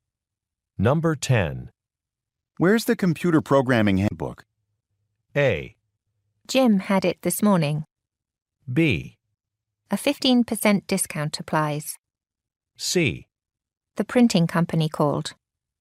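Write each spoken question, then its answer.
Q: Where's the computer programming handbook?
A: A: Jim had it this morning.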